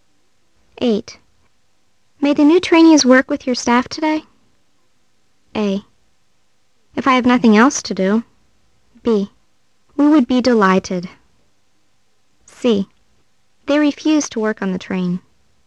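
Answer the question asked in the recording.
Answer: B: We would be delighted.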